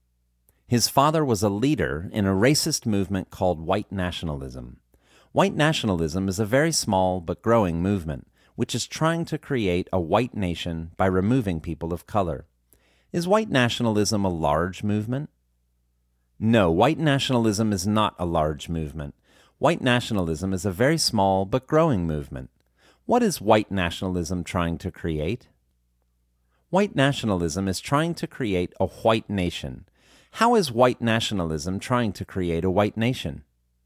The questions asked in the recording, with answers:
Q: Is white nationalism a large movement?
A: No, white nationalism is not a large movement.

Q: How is white nationalism trying to create a white nation?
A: White nationalism is trying to create a white nation by removing people of color.